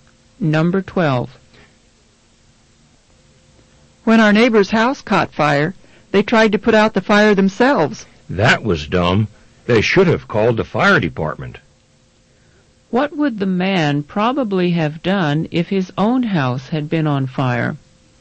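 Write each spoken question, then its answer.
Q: What would the man probably have done if his own house had been on fire?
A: Called the fire department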